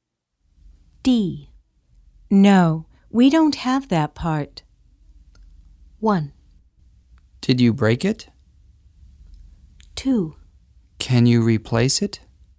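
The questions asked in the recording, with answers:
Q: No, we don't have that part.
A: 2: Can you replace it?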